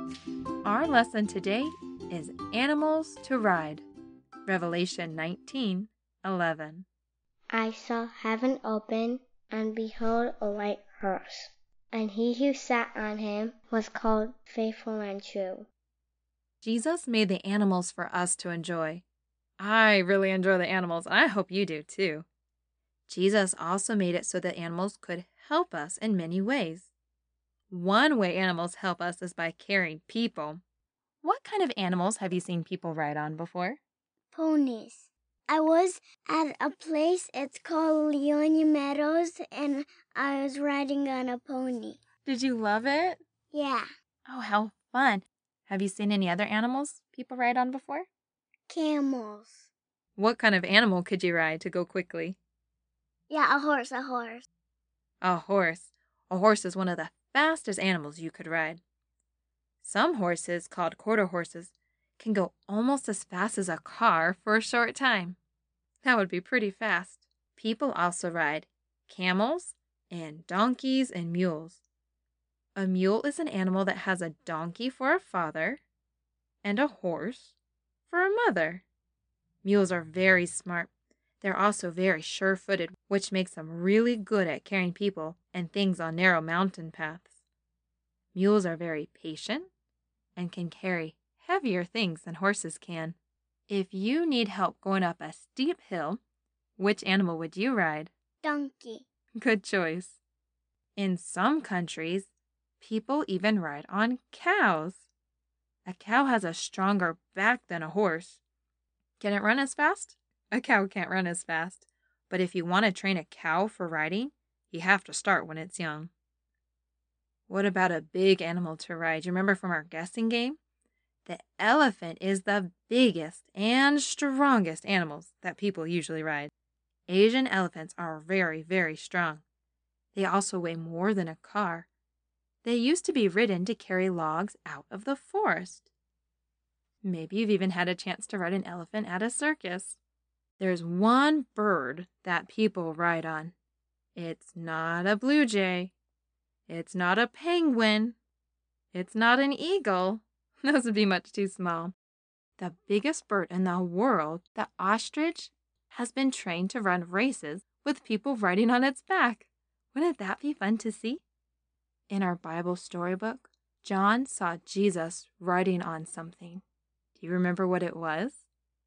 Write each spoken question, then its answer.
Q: In our Bible storybook, John saw Jesus riding on something. Do you remember what it was?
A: He saw Jesus riding on a beautiful white horse.